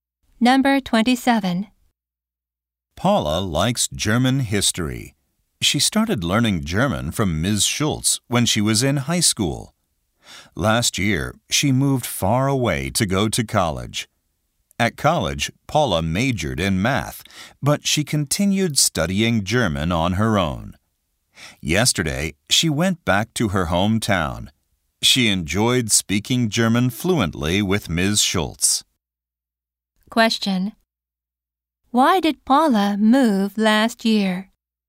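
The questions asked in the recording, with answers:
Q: Why did Paula move last year?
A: To go to college.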